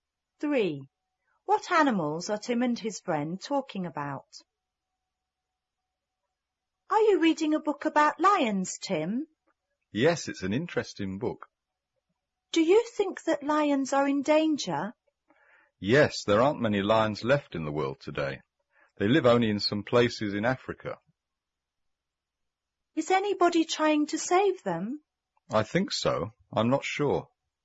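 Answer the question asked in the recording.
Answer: Lions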